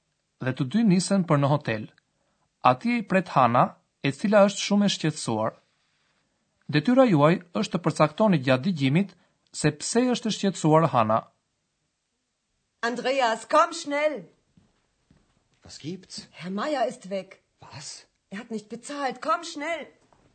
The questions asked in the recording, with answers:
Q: Detyra juaj është të përcaktoni gjatë digjimit se pse është e shqetsuar Hana.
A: ndoshta e kuptuat që Hana është e shqetësuar sepse Zoti Majer ka ikur.